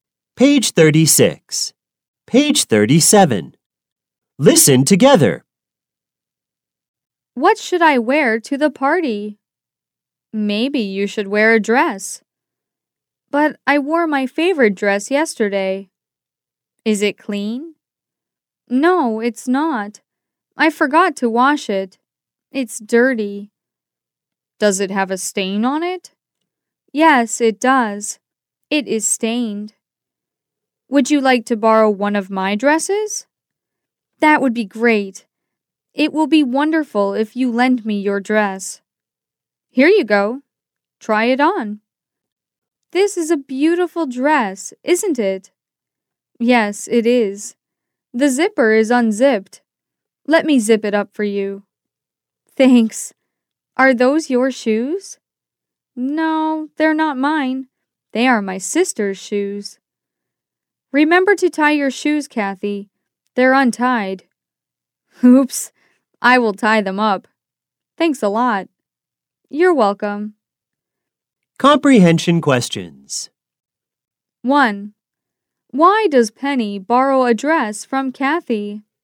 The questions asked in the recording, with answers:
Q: Why does Penny borrow a dress from Kathy?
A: Because she has a party to go to.